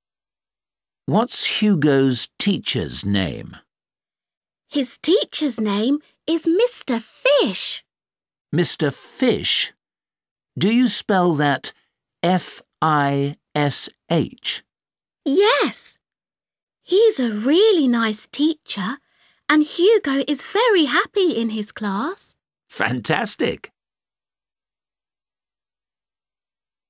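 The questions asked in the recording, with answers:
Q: What's Hugo's teacher's name?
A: Mr. Fish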